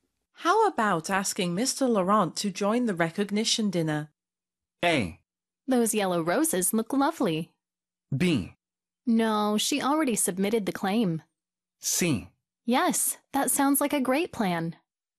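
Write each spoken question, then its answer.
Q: How about asking Mr. Laurent to join the recognition dinner?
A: C: Yes, that sounds like a great plan.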